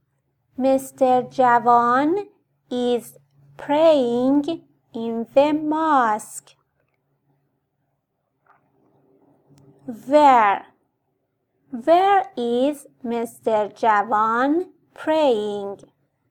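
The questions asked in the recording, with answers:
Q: Where is Mr. Javan praying?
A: in the mosque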